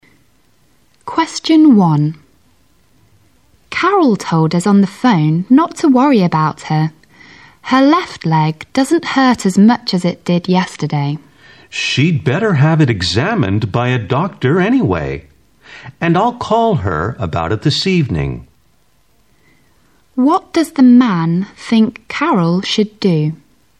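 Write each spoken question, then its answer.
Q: What does the man think Carol should do?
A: Have her leg examined by a doctor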